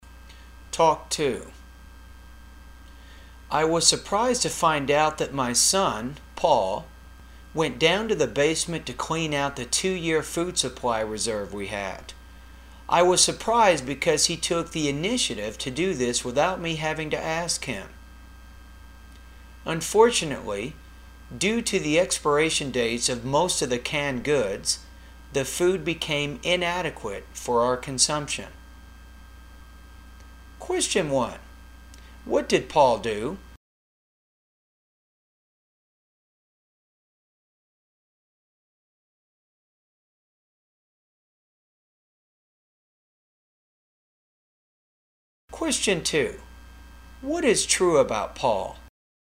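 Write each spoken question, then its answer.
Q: What did Paul do?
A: He went down to the basement and cleaned out the 2-year food supply reserve.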